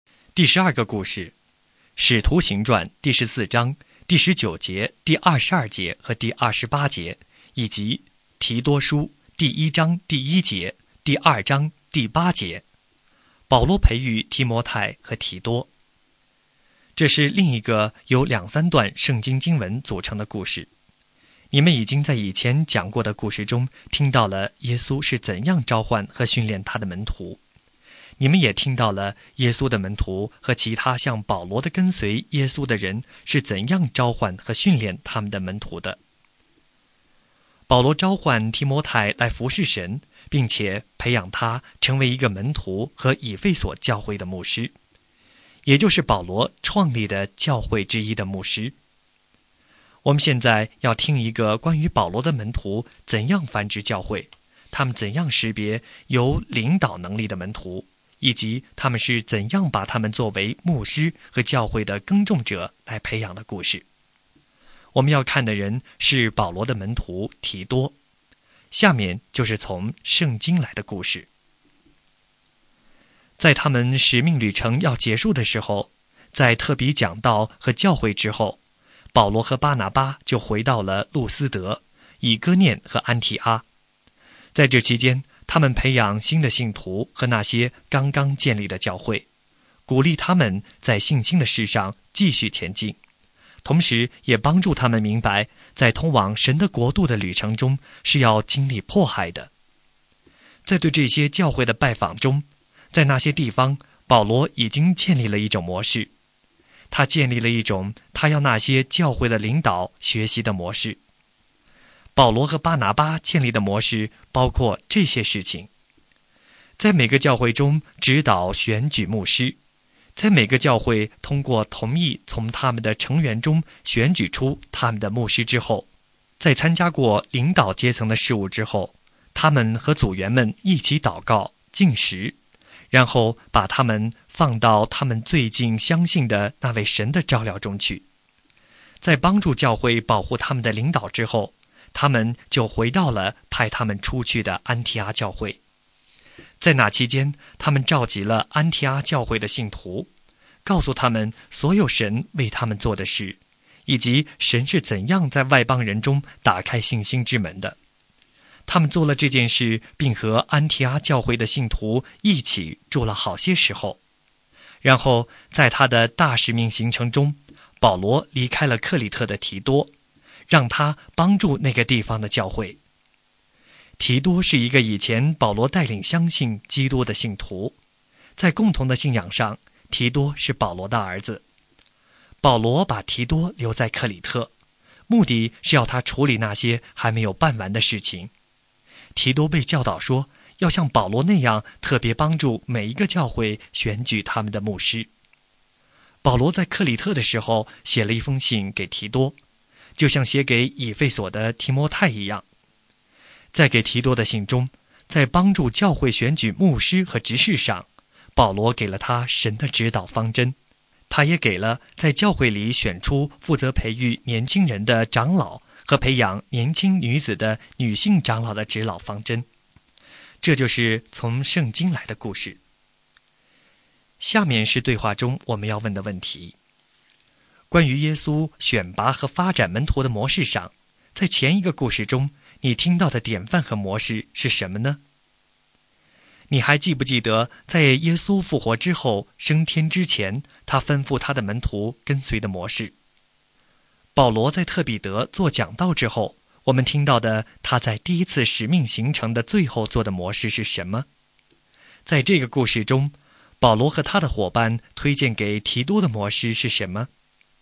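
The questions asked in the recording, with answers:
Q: 保罗在特比德做讲道之后,我们听到的他在第一次使命行程的最后做的模式是什么?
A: 回到路斯德、以哥念和安提阿,坚固信徒和教会,在每个教会选举牧师,祷告进食,把他们交托给神

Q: 在这个故事中,保罗和他的伙伴推荐给提多的模式是什么?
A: 像保罗那样帮助每一个教会选举他们的牧师(长老)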